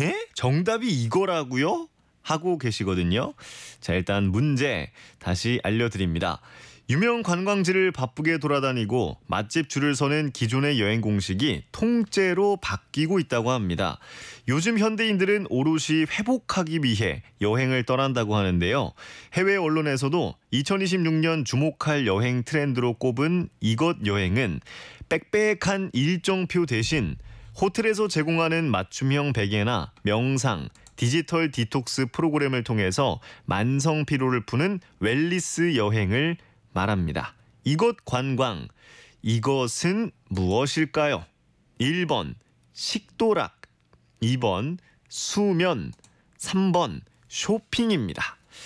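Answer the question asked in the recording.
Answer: 2번: 수면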